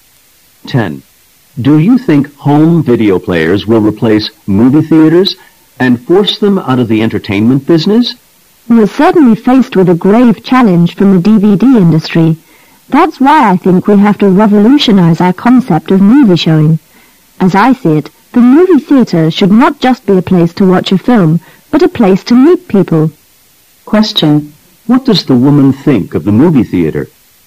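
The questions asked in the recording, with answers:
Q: What does the woman think of the movie theater?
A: It should also be a place to meet people.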